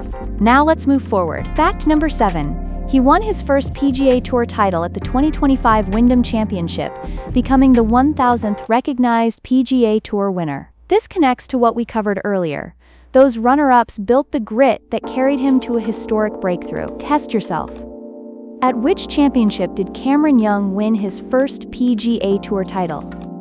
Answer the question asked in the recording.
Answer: Correct answer, the Wyndham Championship.